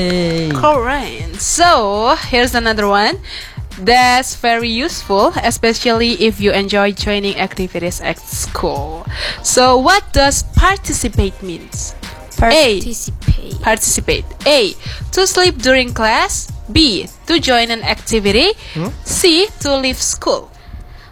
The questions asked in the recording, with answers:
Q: So what does participate mean?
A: To join an activities, and that's right.